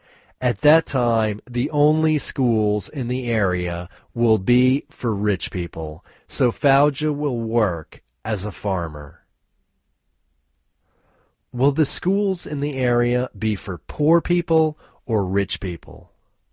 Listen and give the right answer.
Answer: The schools in the area will be for rich people.